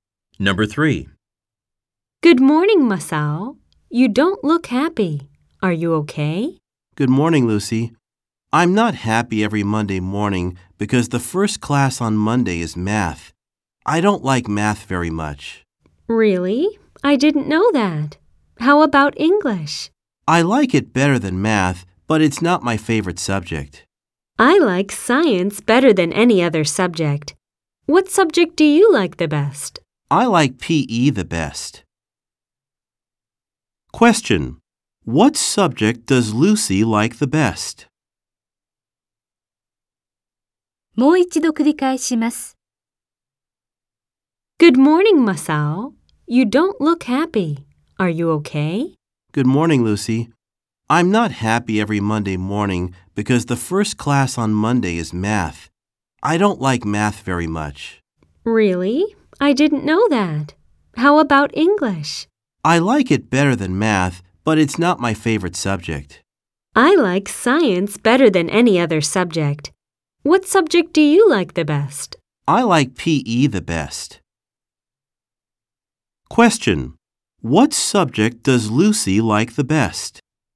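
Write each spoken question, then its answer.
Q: What subject does Lucy like the best?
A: PE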